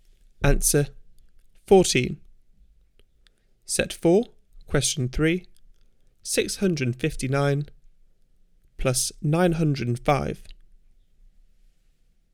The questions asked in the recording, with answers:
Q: 659 plus 905.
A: Answer 1564.